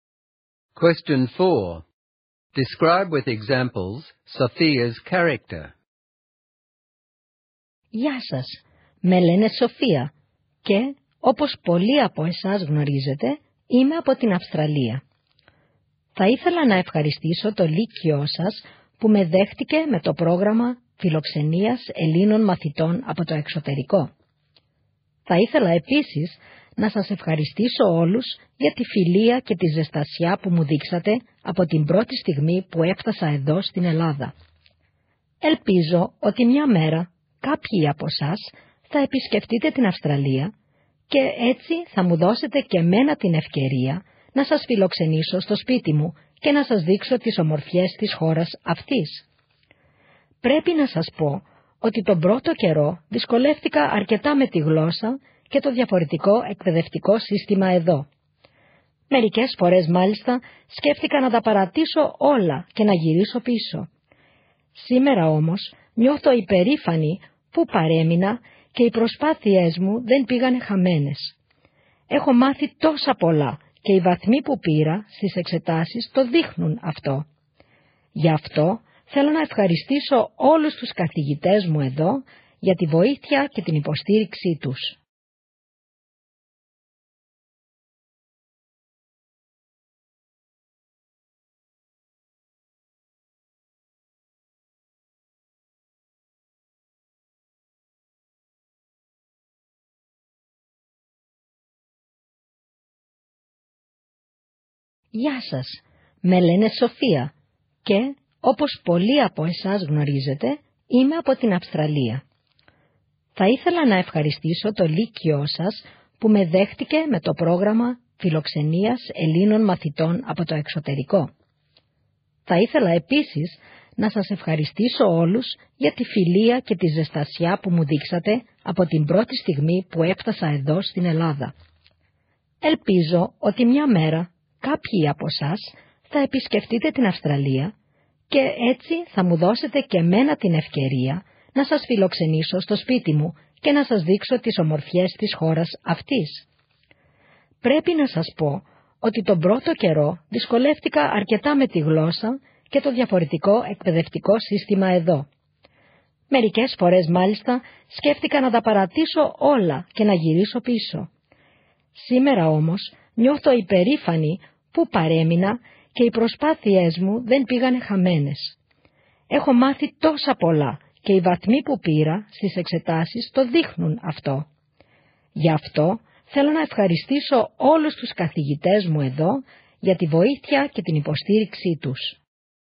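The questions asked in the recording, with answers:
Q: Describe with examples Sophia's character.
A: She is grateful: she thanks the school, her friends and her teachers. She is generous: she offers to host them in Australia. She is determined: she did not give up despite difficulties, and her grades show it.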